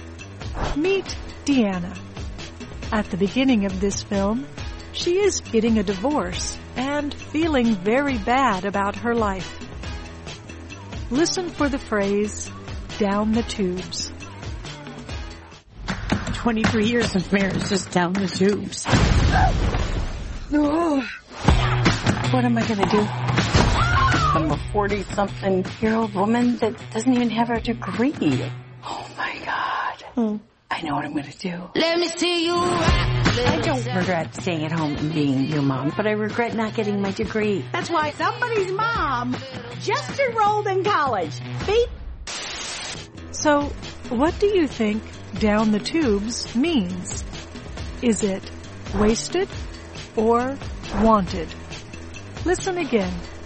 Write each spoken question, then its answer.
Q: So, what do you think down the tubes means? Is it wasted or wanted?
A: Down the tubes means wasted.